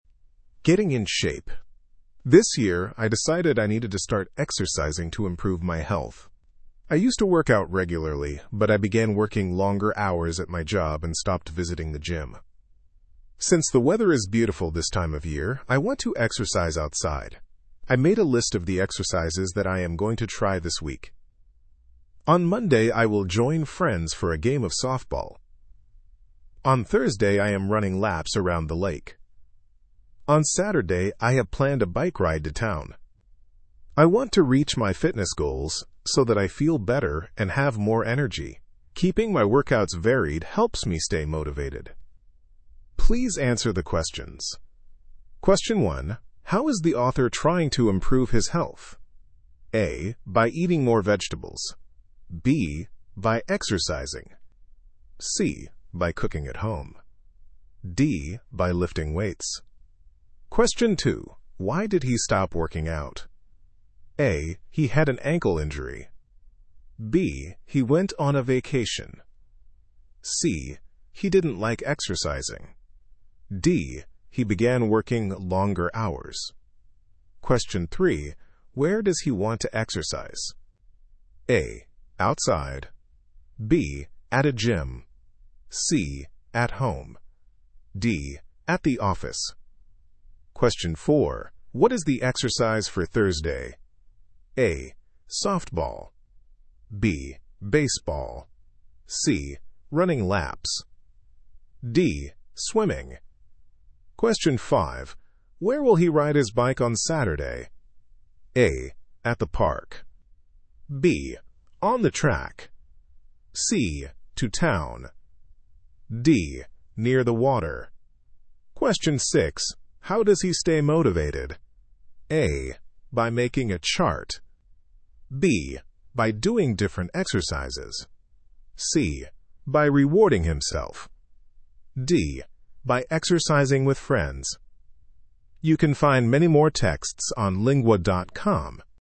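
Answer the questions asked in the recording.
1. B: By exercising.
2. D: He began working longer hours.
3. A: Outside.
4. C: Running laps.
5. C: To town.
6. B: By doing different exercises.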